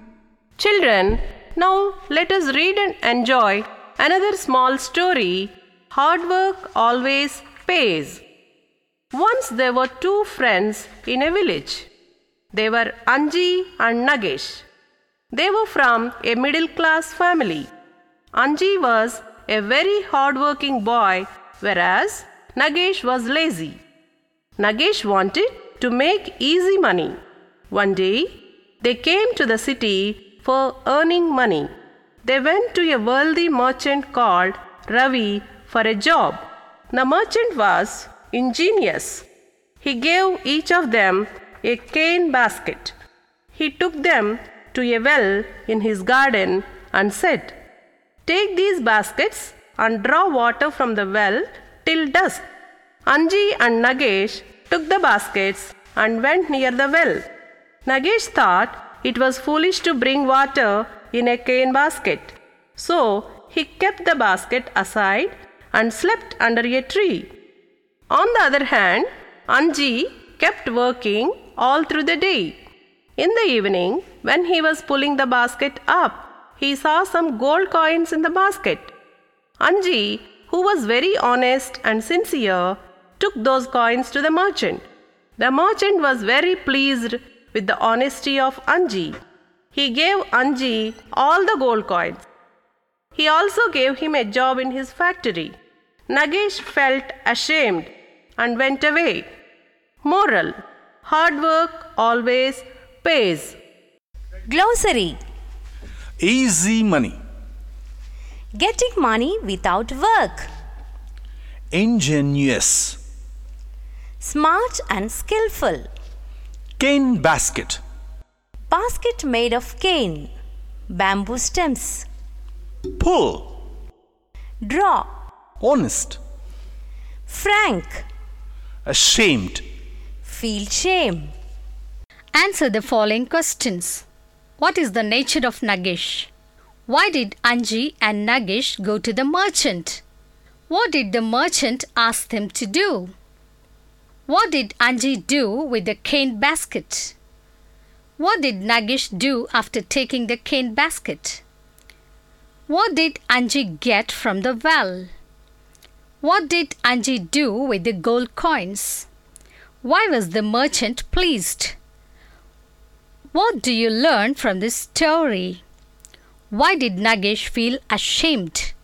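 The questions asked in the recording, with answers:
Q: What is the nature of Nagesh?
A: He was lazy and wanted to make easy money.

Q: Why did Anji and Nagesh go to the merchant?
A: To ask for a job and earn money.

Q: What did the merchant ask them to do?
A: Draw water from the well with cane baskets until dusk.

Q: What did Anji do with the cane basket?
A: He drew water from the well with it all day.

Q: What did Nagesh do after taking the cane basket?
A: He put it aside and slept under a tree.

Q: What did Anji get from the well?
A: Some gold coins.

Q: What did Anji do with the gold coins?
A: He took them to the merchant.

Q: Why was the merchant pleased?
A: Because Anji was honest.

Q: What do you learn from this story?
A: Hard work always pays.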